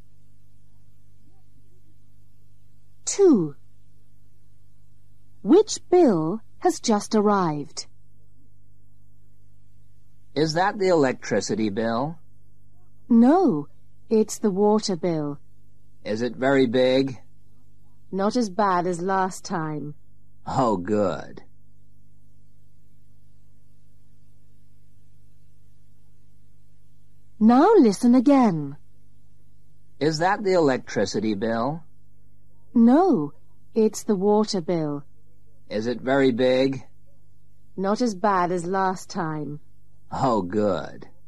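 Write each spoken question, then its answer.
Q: Which bill has just arrived?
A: the water bill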